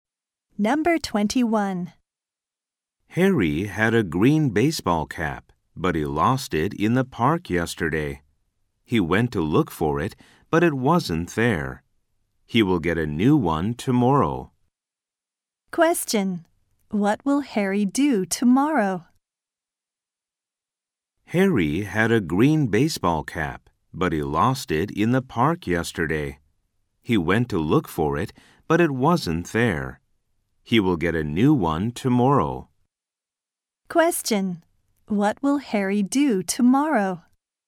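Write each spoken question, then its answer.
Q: What will Harry do tomorrow?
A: Get a new baseball cap.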